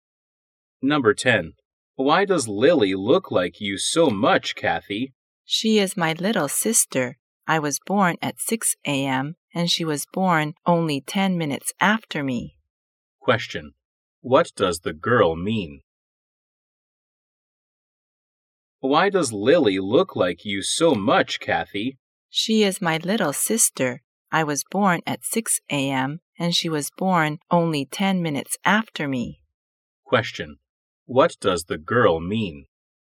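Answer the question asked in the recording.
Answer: Lily and Kathy are twins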